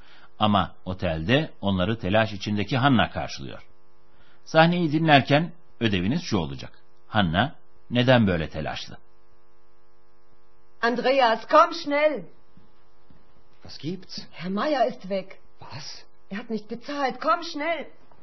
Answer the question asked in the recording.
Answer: Hanna'nın telaşlanmasının nedeni Bay Mayer'in ortadan kaybolmuş olması.